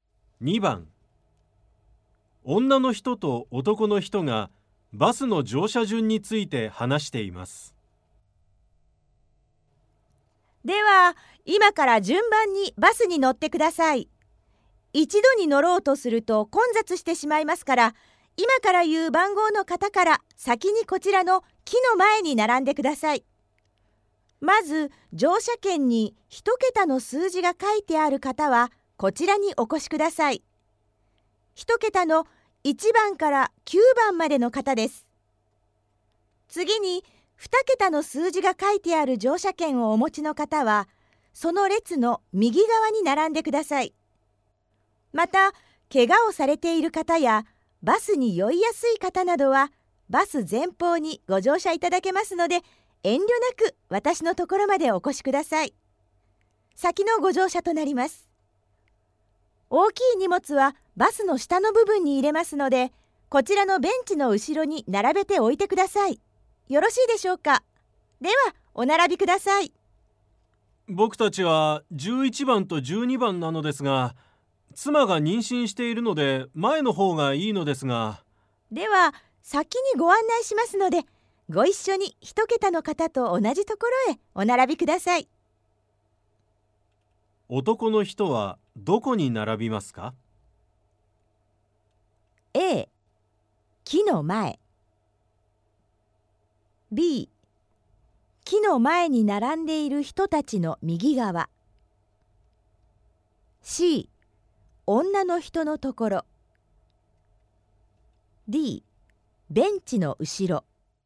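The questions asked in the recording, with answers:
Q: 男の人はどこに並びますか?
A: A: 木の前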